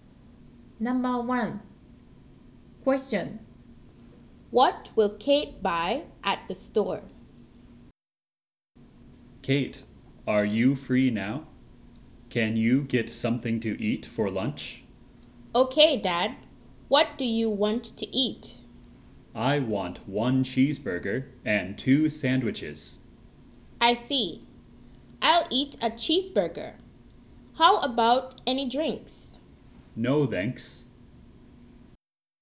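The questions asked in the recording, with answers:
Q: What will Kate buy at the store?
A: two cheeseburgers and two sandwiches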